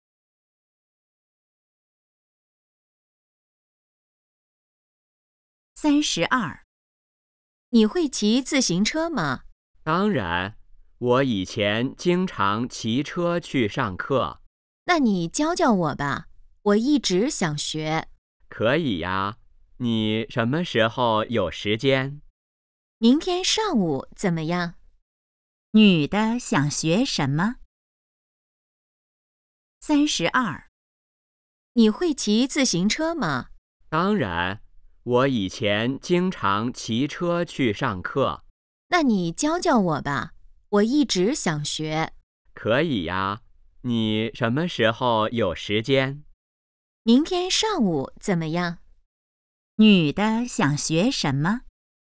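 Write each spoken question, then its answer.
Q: 女的想学什么?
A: 骑自行车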